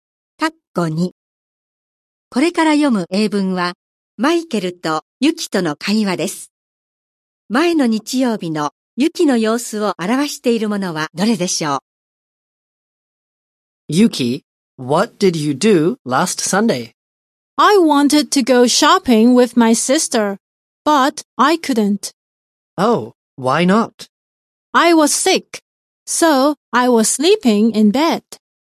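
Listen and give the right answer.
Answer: 病気でベッドで寝ていた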